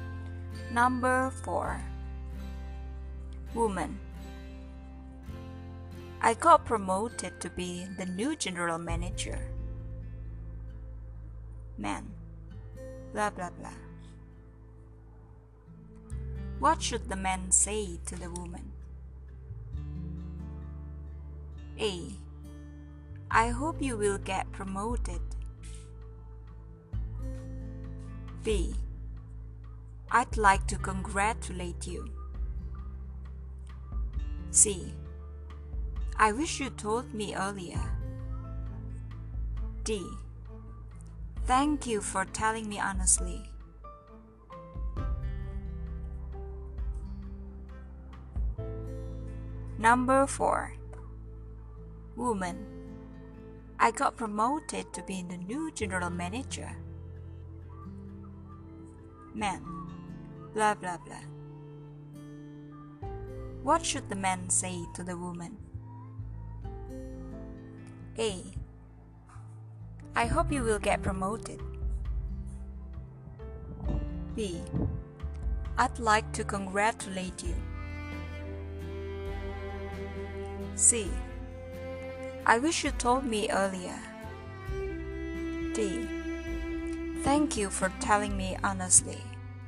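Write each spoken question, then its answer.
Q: What should the man say to the woman?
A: B: I'd like to congratulate you.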